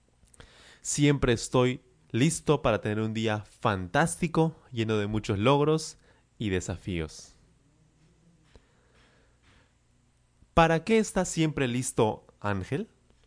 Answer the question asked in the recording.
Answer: Claro, él está listo siempre para tener un día fantástico, lleno de muchos logros y desafíos